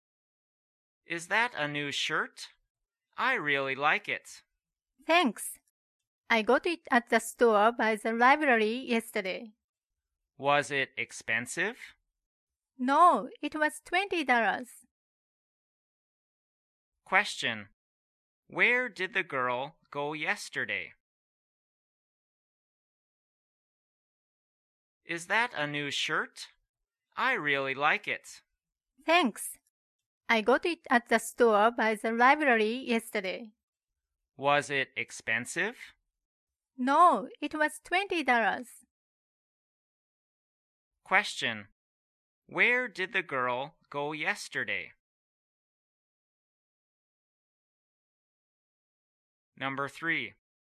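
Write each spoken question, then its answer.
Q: Where did the girl go yesterday?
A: To the store by the library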